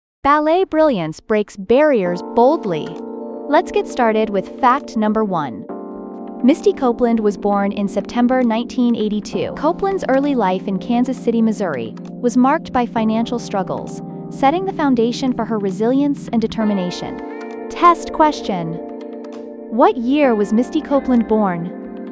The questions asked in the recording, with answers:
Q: What year was Misty Copeland born?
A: 1982.